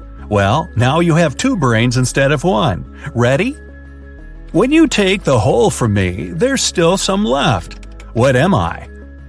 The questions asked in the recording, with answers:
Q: What am I?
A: Both you and your sister answer wholesome.